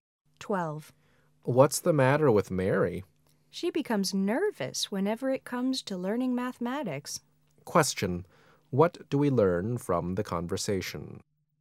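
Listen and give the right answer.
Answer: Mary gets nervous about learning mathematics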